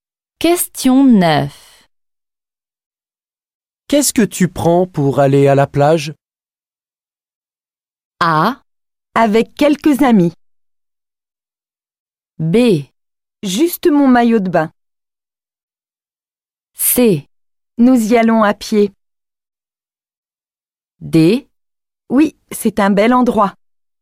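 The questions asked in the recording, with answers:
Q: Qu'est-ce que tu prends pour aller à la plage?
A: B: Juste mon maillot de bain.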